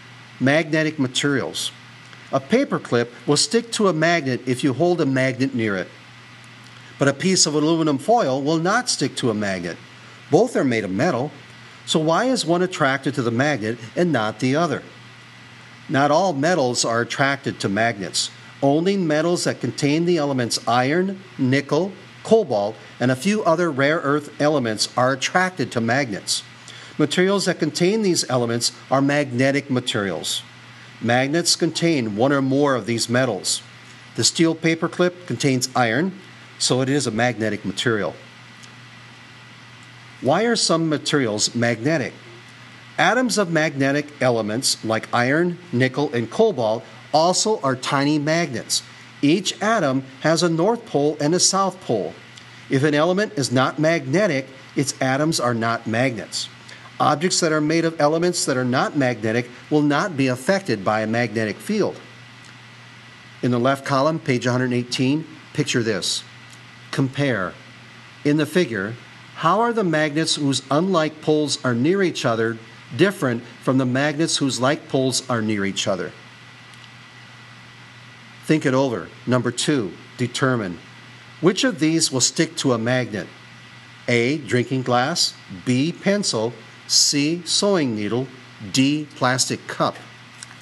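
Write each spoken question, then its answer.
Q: Which of these will stick to a magnet?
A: C: sewing needle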